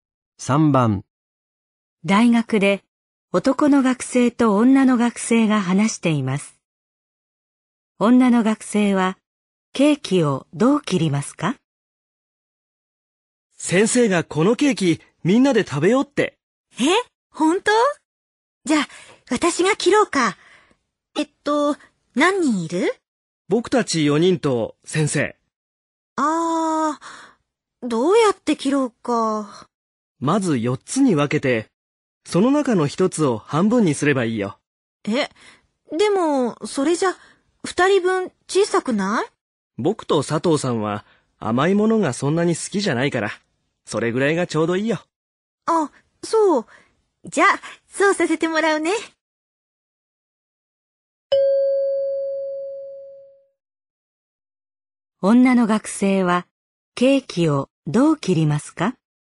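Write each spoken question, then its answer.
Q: 女の学生はケーキをどう切りますか?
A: まず4つに分けて、その中の1つを半分にする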